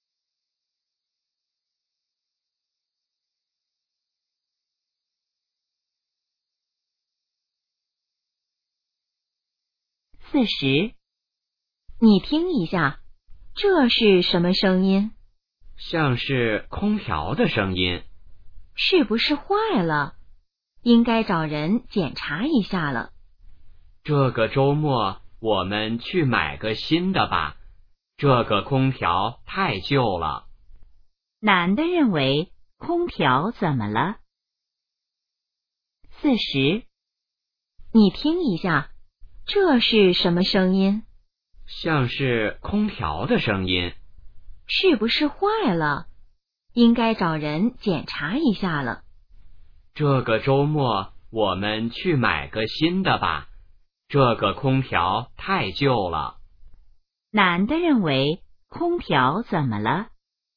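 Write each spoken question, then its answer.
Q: 男的认为空调怎么了?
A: 太旧了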